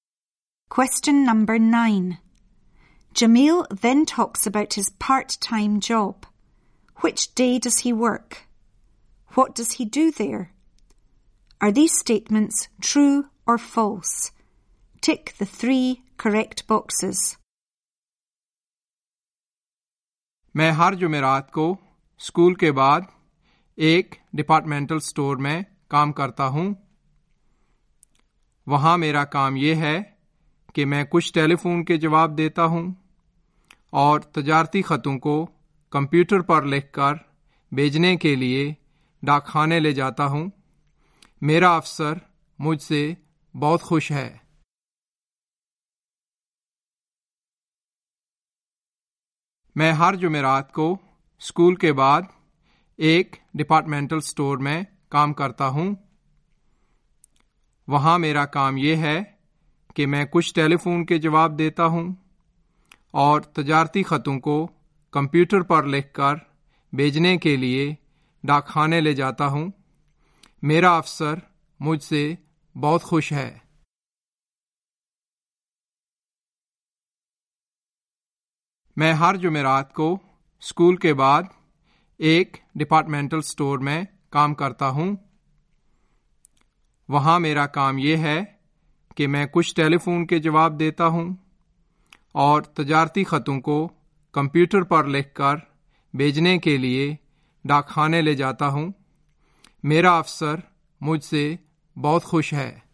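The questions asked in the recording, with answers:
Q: Which day does he work?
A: Thursday, after school

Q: What does he do there?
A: He answers some phone calls and takes business letters typed on the computer to the post office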